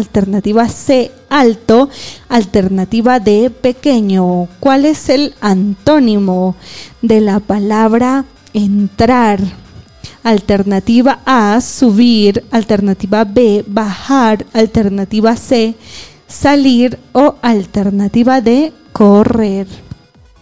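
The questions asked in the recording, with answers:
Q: ¿Cuál es el antónimo de la palabra entrar?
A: C: salir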